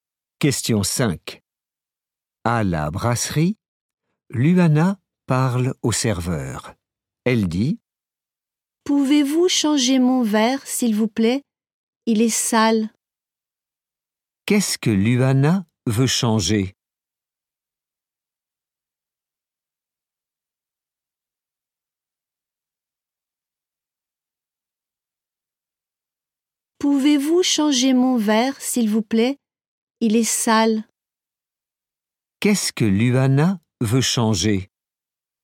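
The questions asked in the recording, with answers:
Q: Qu'est-ce que Luana veut changer?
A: Son verre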